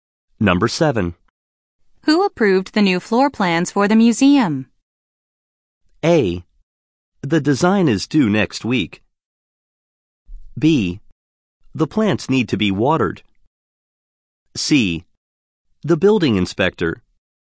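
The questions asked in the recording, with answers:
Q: Who approved the new floor plans for the museum?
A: C: The building inspector.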